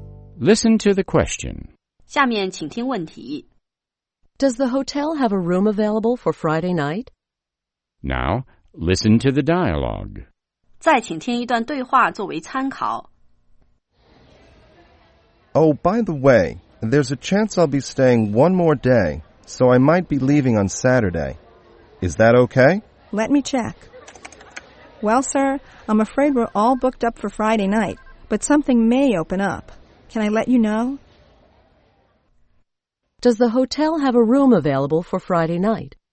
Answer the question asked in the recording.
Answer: No, the hotel is fully booked on Friday night.